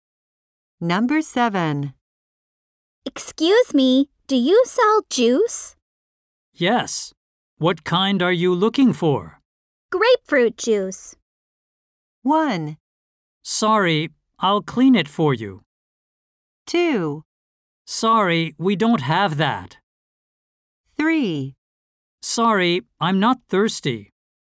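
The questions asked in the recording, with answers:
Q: Grapefruit juice.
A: 2: Sorry, we don't have that.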